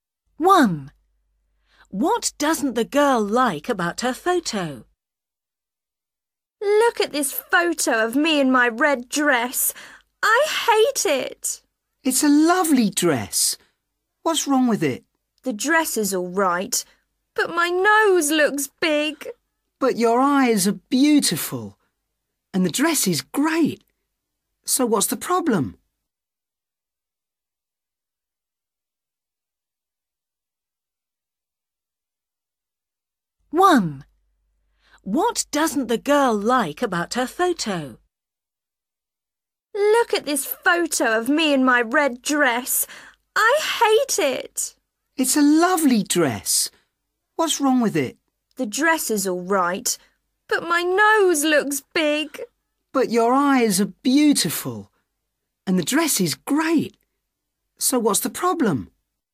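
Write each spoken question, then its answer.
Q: What doesn't the girl like about her photo?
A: Her nose (it looks big)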